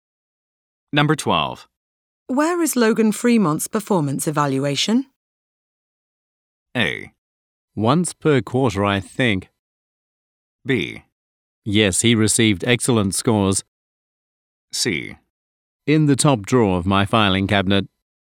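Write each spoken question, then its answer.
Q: Where is Logan Fremont's performance evaluation?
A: C: In the top drawer of my filing cabinet.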